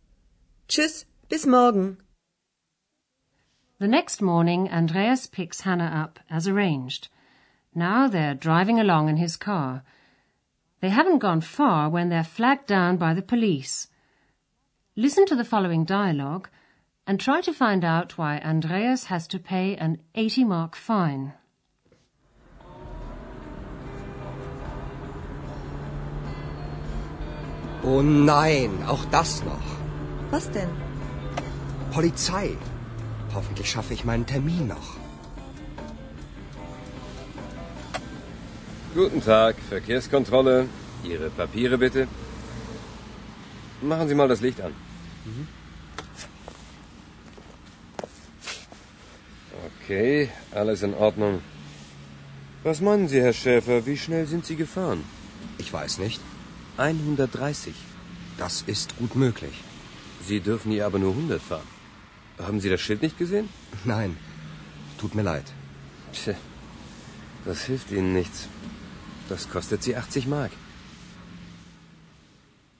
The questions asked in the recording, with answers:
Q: try to find out why Andreas has to pay an 80 mark fine.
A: Andreas has to pay an 80 mark fine because he was driving too fast.